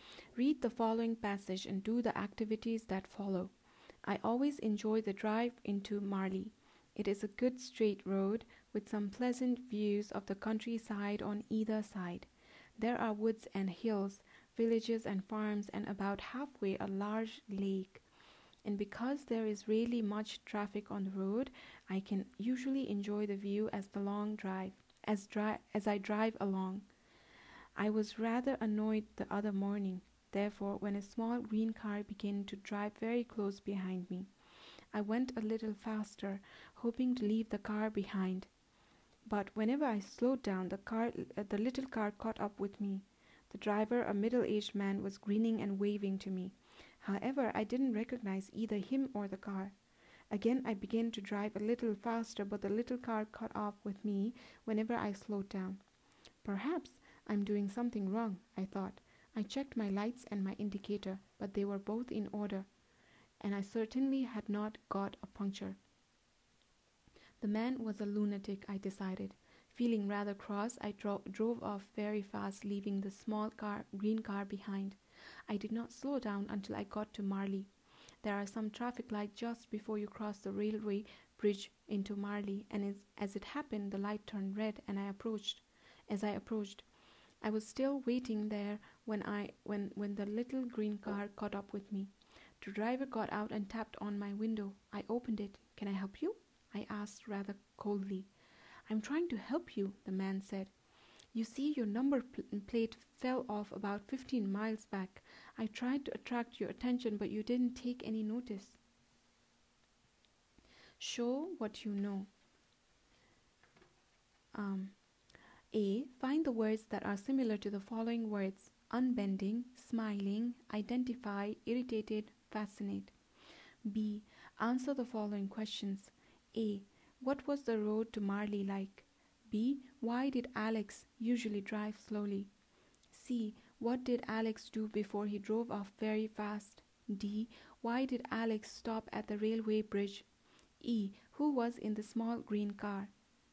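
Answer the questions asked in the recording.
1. A good straight road with pleasant views of the countryside
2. The traffic light turned red
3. A middle-aged man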